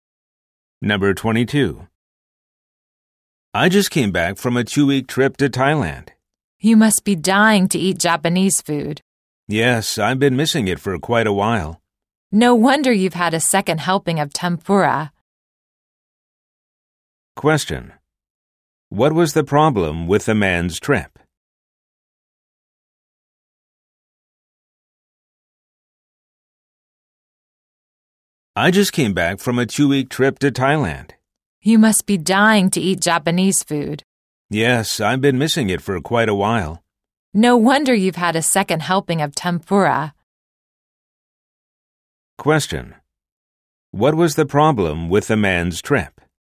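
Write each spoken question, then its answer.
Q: What was the problem with the man's trip?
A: He missed Japanese food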